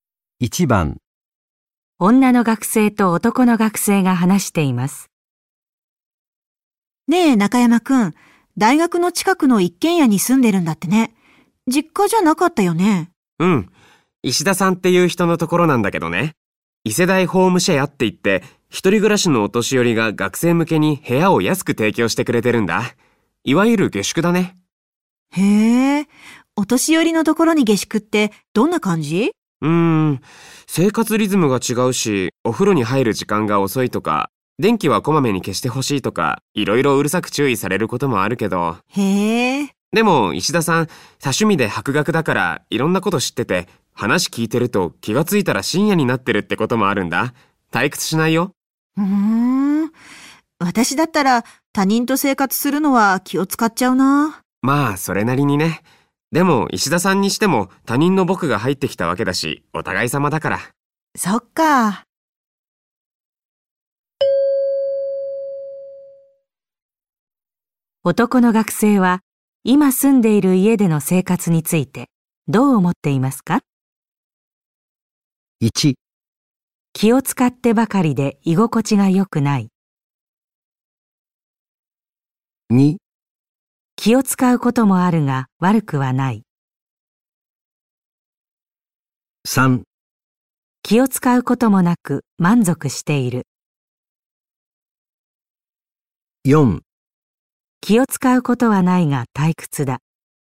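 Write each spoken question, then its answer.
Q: 男の学生は今住んでいる家での生活についてどう思っていますか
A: 2: 気を使うこともあるが悪くはない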